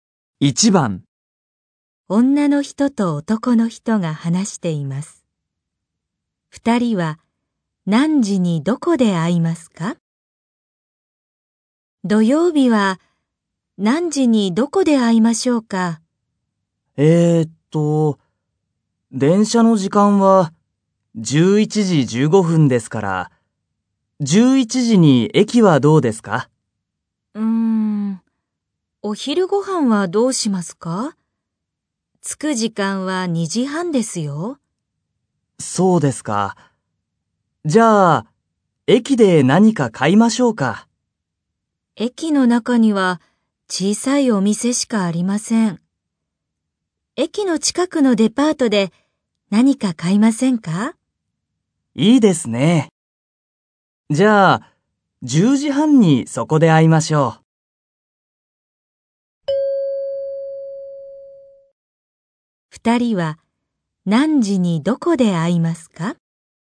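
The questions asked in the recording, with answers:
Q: 二人は何時にどこで会いますか?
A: 10時半に駅の近くのデパートで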